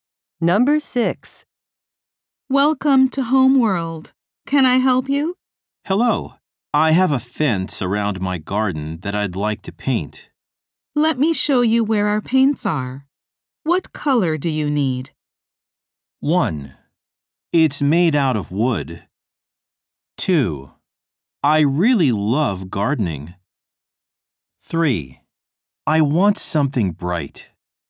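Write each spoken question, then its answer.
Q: What color do you need?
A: 3: I want something bright.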